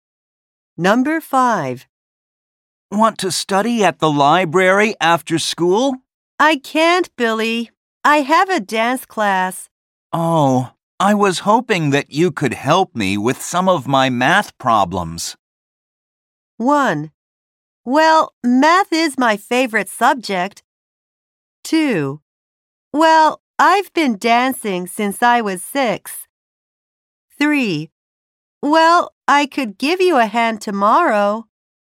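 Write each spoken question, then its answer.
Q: Oh, I was hoping that you could help me with some of my math problems.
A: 3: Well, I could give you a hand tomorrow.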